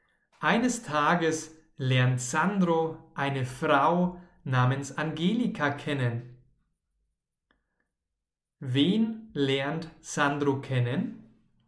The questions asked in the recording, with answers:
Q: Wen lernt Sandro kennen?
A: Eine Frau namens Angelika.